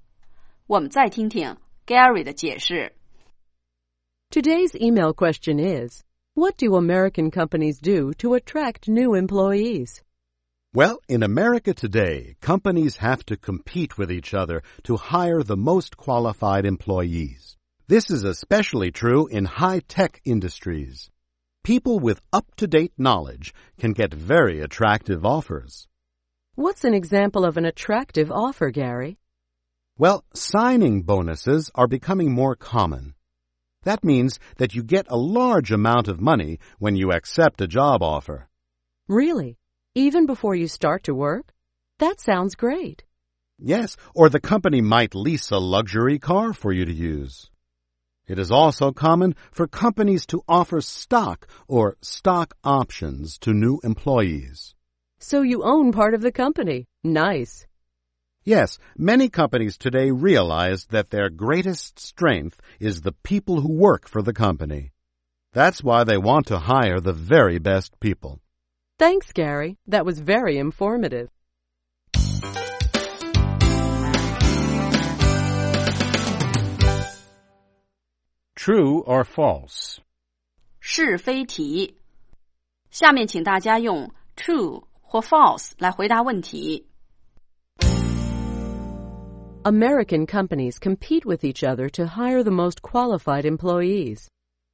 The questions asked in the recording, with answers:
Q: American companies compete with each other to hire the most qualified employees.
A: True. This is especially true in high-tech industries.